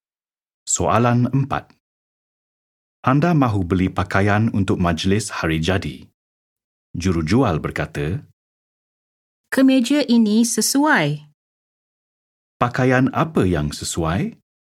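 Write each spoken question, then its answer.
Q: Pakaian apa yang sesuai?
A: Kemeja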